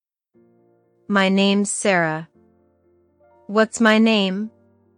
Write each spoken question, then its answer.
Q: What's my name?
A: Sarah. My name is Sarah.